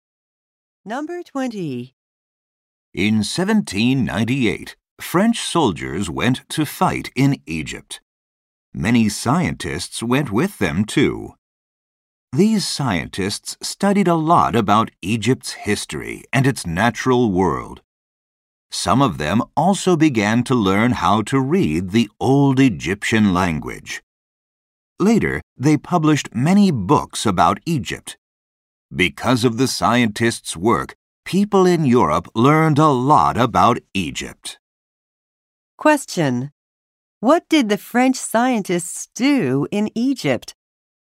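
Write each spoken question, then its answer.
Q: What did the French scientists do in Egypt?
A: Studied Egypt's history and nature and learned to read the old language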